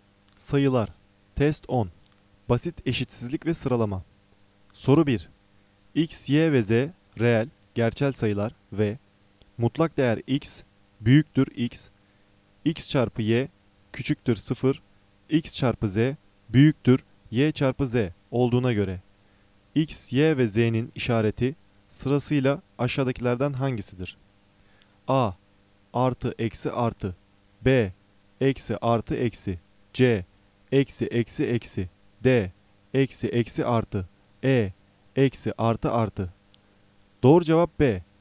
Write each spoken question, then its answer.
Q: X, Y ve Z reel, gerçel sayılar ve mutlak değer X, büyüktür X, X çarpı Y küçüktür 0, X çarpı Z büyüktür Y çarpı Z olduğuna göre X, Y ve Z'nin işareti sırasıyla aşağıdakilerden hangisidir?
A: Doğru cevap B. Eksi artı eksi